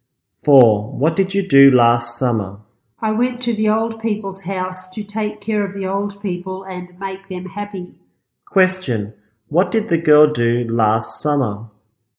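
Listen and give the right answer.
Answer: She took care of the old people at the old people's house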